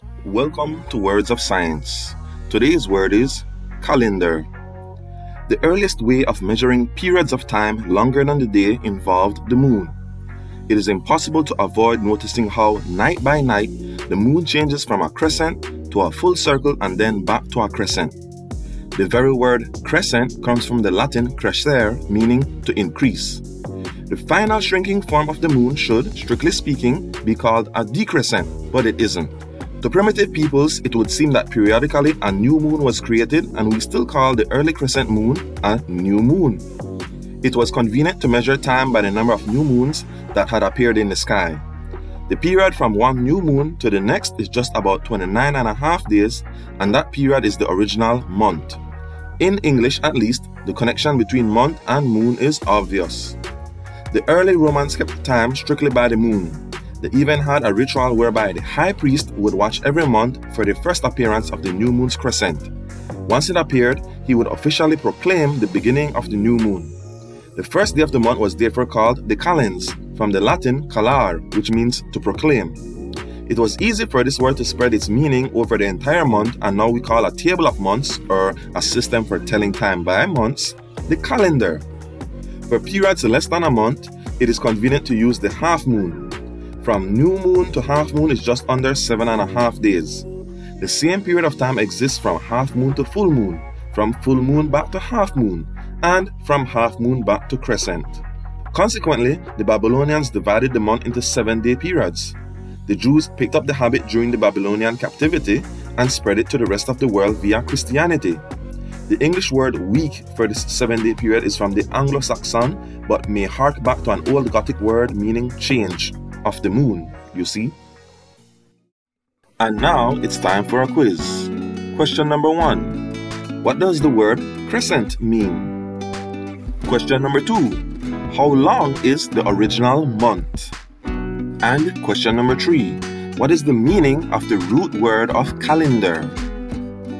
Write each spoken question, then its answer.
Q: What does the word crescent mean?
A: it means to increase.

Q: How long is the original month?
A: 29 and a half days.

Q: What is the meaning of the root word of calendar?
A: it means to proclaim.